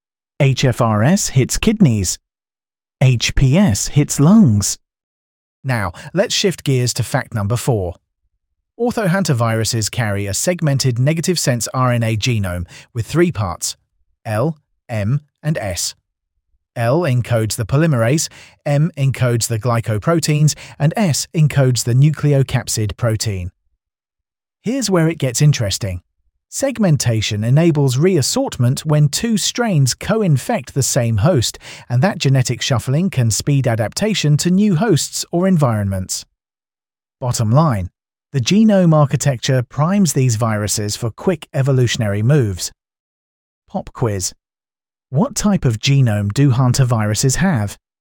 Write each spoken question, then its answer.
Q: Pop quiz. What type of genome do hantaviruses have?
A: Correct answer, segmented negative sense RNA.